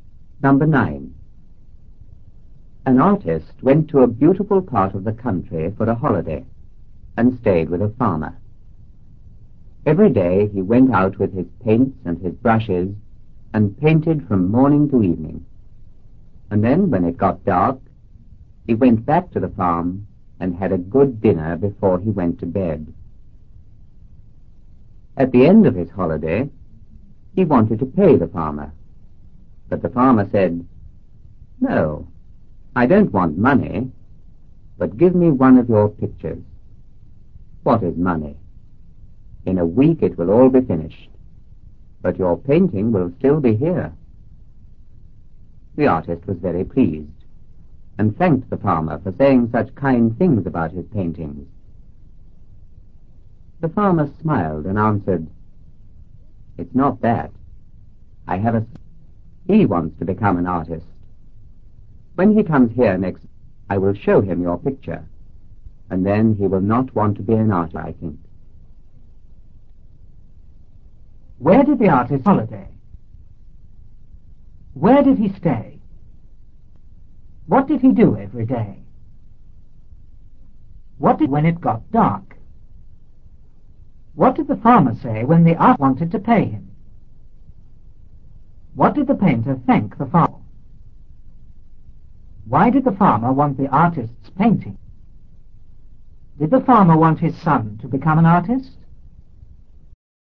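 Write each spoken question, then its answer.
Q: Where did the artist holiday?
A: In a beautiful part of the country

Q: Where did he stay?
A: With a farmer

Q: What did he do every day?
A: He went out with his paints and brushes and painted from morning to evening

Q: What did when it got dark?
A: He went back to the farm, had a good dinner and went to bed

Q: What did the farmer say when the artist wanted to pay him?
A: He didn't want money but wanted one of the artist's pictures

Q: What did the painter thank the farmer?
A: For saying kind things about his paintings

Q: Why did the farmer want the artist's painting?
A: To show his son so he would not want to be an artist

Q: Did the farmer want his son to become an artist?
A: No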